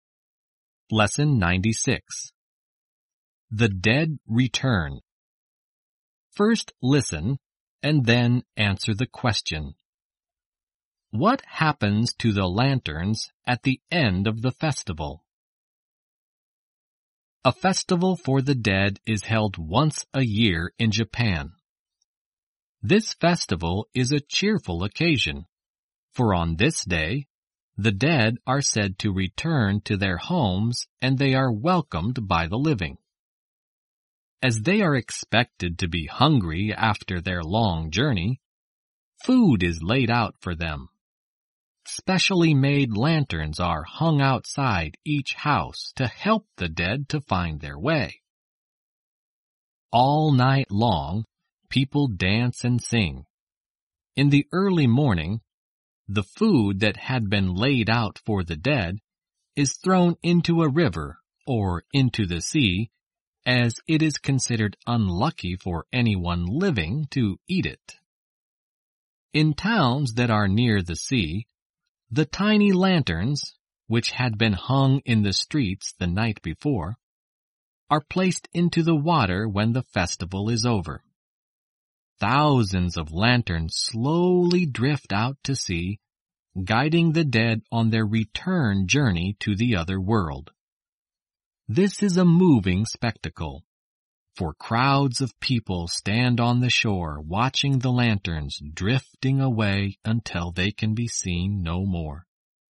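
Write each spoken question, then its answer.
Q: What happens to the lanterns at the end of the festival?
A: They are placed into the water and drift out to sea, guiding the dead back to the other world.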